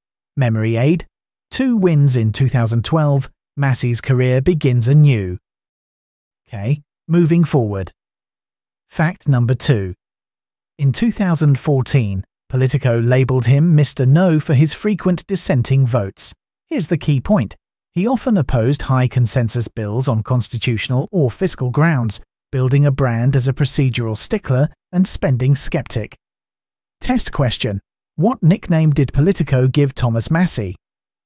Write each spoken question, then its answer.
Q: What nickname did Politico give Thomas Massie?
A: Mr. Nubber